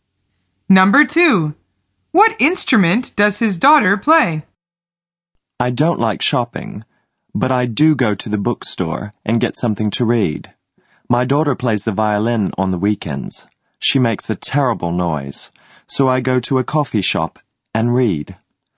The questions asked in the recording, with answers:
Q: What instrument does his daughter play?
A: The answer is the violin.